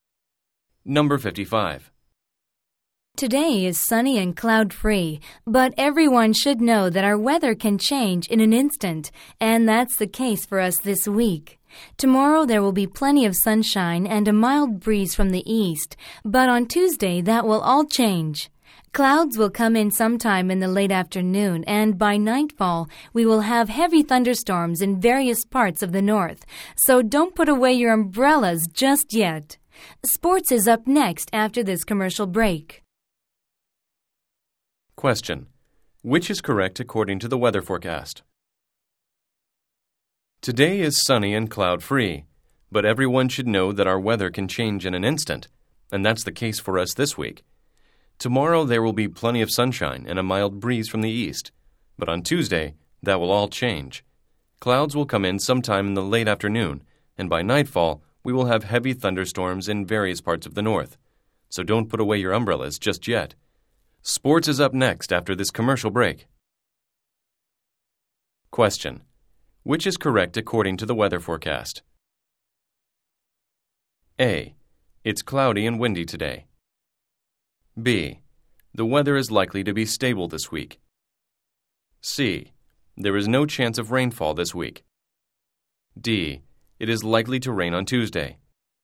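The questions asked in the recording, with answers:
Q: Which is correct according to the weather forecast?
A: D: It is likely to rain on Tuesday.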